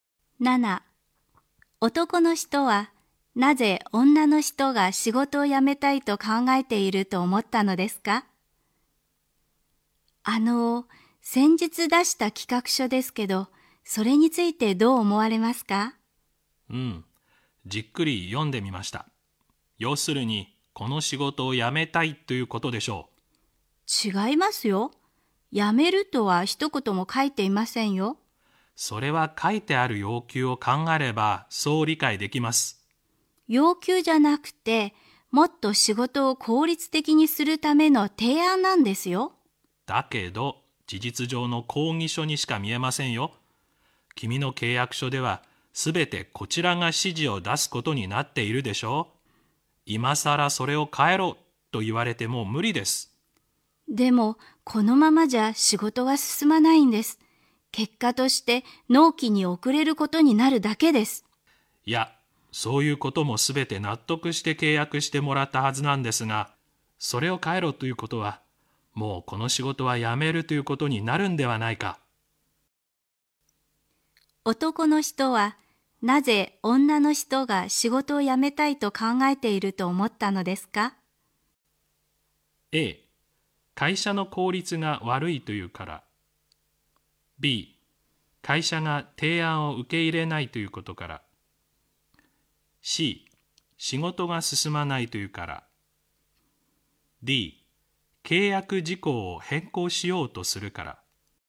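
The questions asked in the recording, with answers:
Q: 男の人は、なぜ女の人が仕事を辞めたいと考えていると思ったのですか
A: D: 契約事項を変更しようとするから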